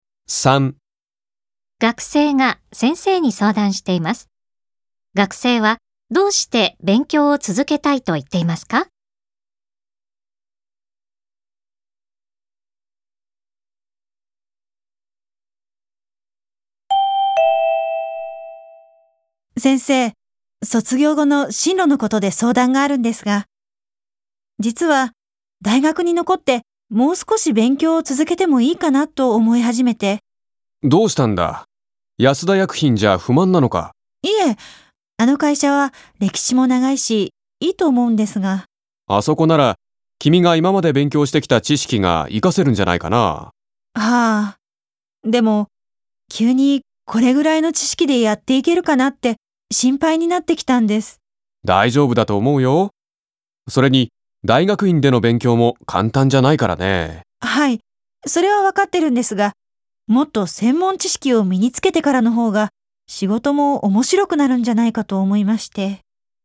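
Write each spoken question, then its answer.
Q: 学生はどうして勉強を続けたいと言っていますか?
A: もっと専門知識を身につけてからの方が仕事が面白くなると思うから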